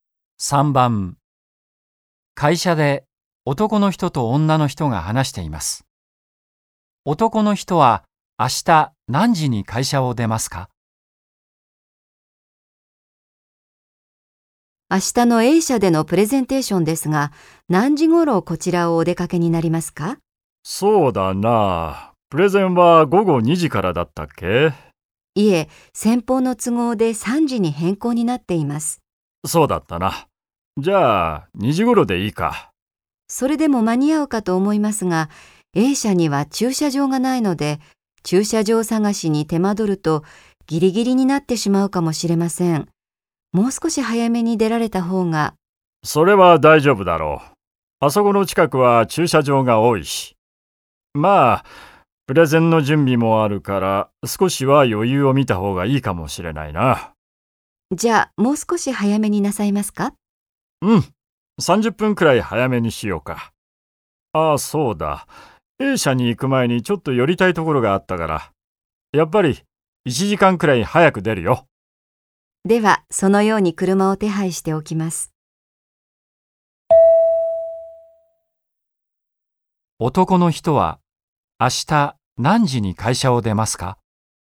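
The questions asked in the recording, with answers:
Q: 男の人は明日何時に会社を出ますか?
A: 1時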